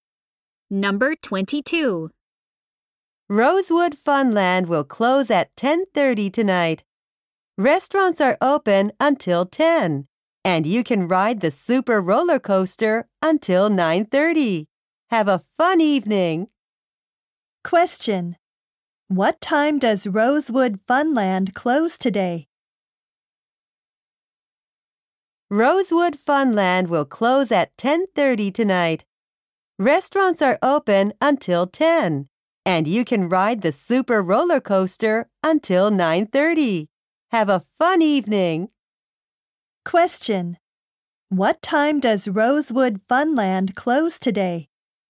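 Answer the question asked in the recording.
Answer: At 10:30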